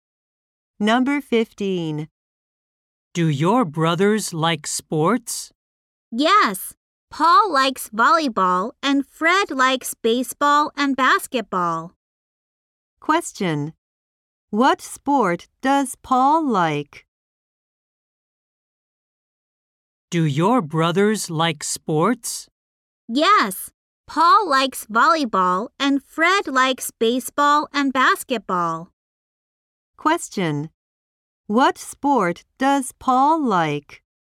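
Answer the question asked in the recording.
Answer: Volleyball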